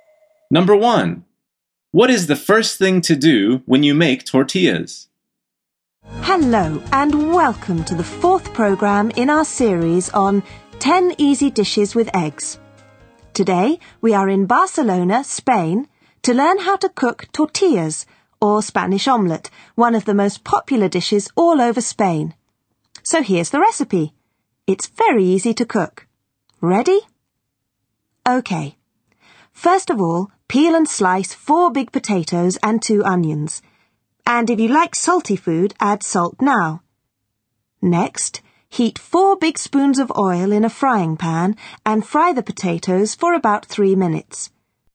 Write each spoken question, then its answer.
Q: What is the first thing to do when you make tortillas?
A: The answer is peel and slice 4 potatoes and 2 onions.